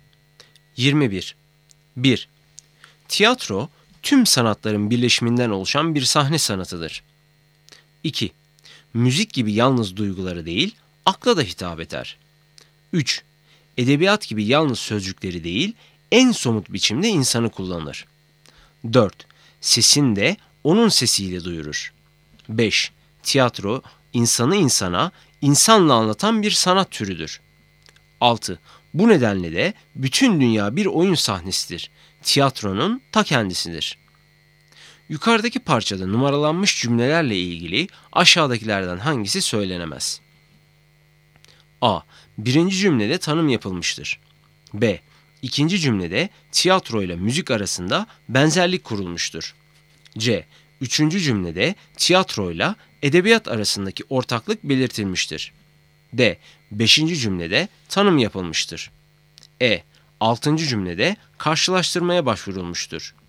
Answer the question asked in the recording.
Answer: Doğru cevap E. Altıncı cümlede karşılaştırmaya başvurulmuştur.